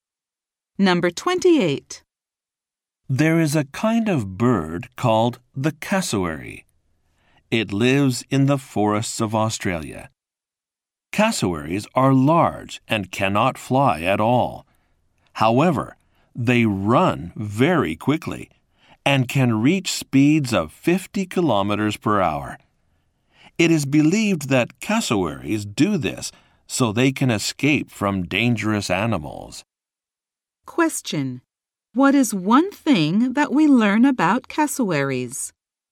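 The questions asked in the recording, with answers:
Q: What is one thing that we learn about cassowaries?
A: They cannot fly but can run very fast.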